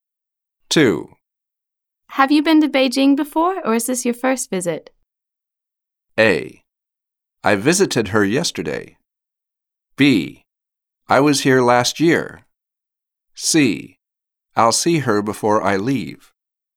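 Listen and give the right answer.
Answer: B: I was here last year.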